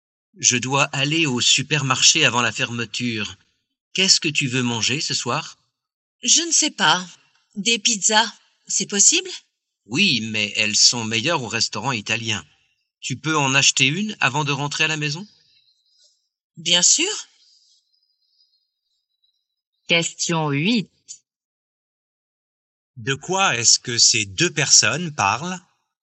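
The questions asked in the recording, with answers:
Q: De quoi est-ce que ces deux personnes parlent?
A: Du repas de ce soir (des pizzas)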